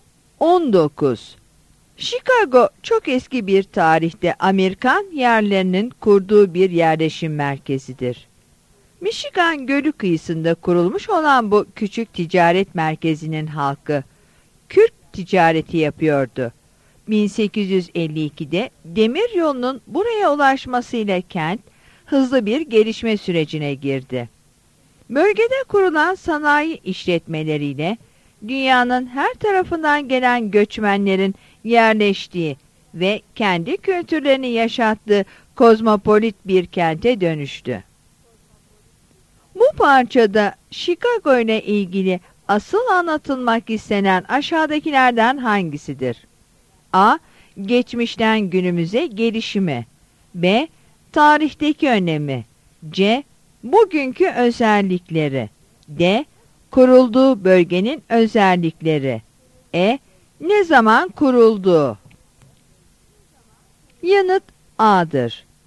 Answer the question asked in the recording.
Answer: Yanıt A'dır.